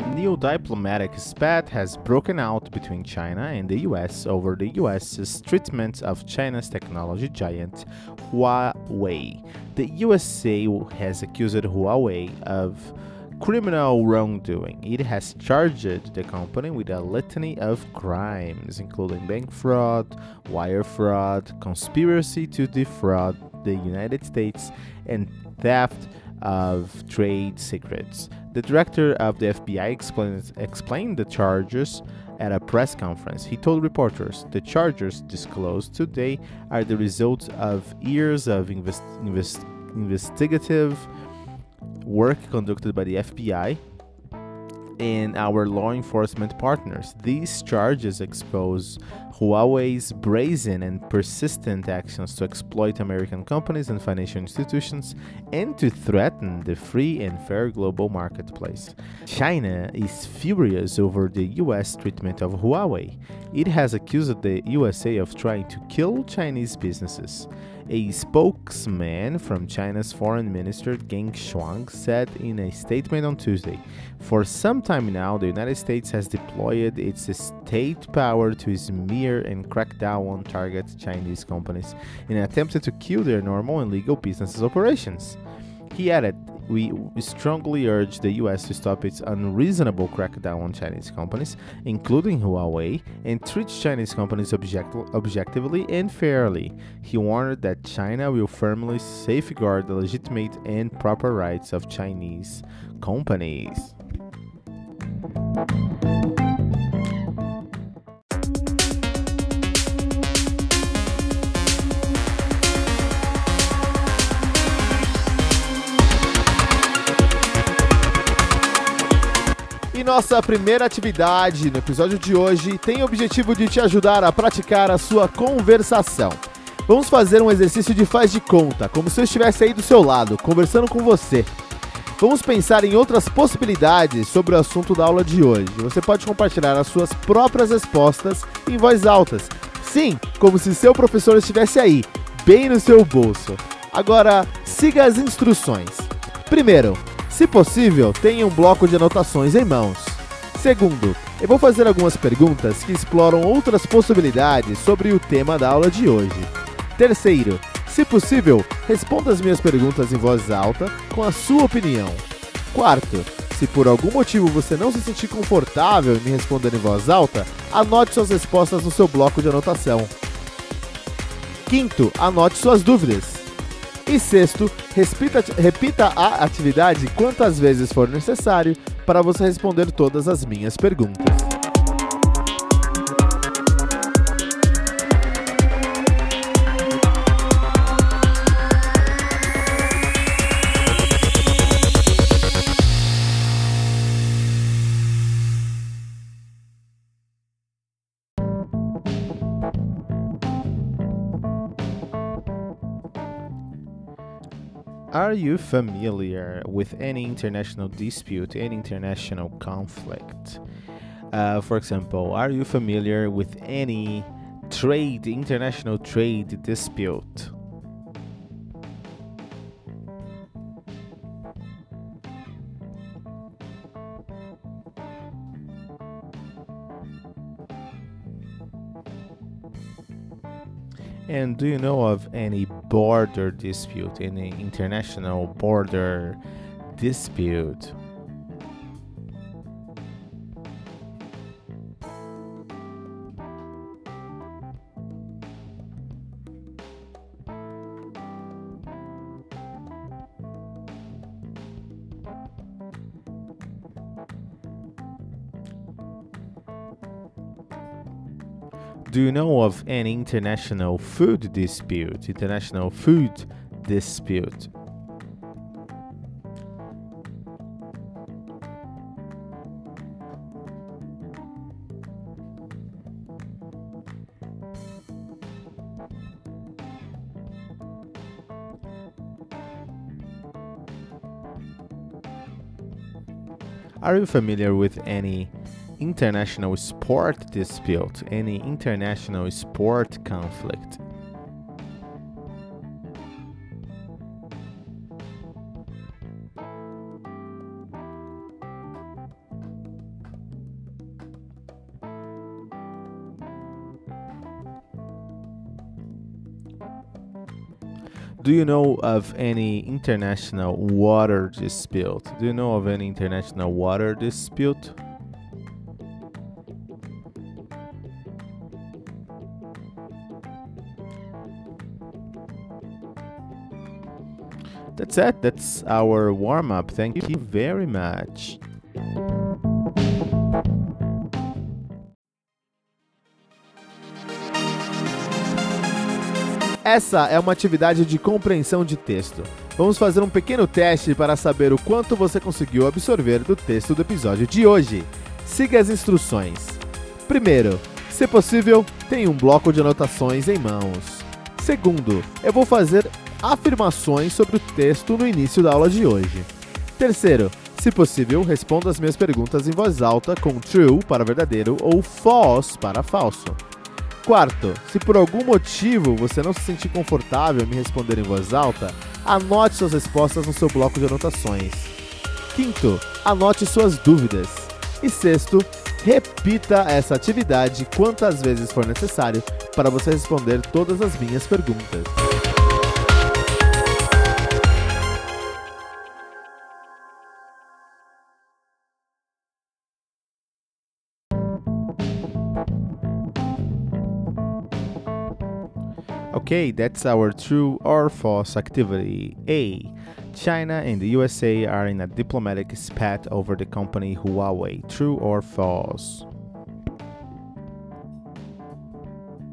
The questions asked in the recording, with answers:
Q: China and the USA are in a diplomatic spat over the company Huawei.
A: This is true. This is true.